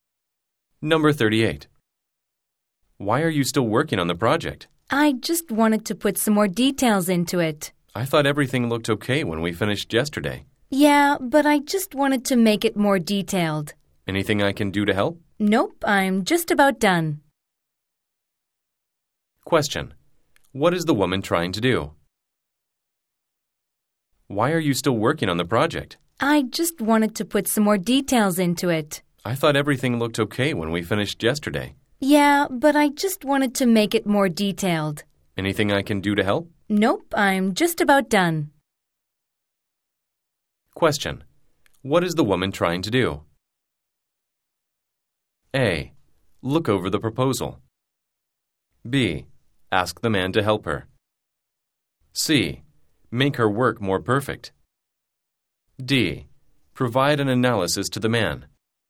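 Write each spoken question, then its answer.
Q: What is the woman trying to do?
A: C: Make her work more perfect.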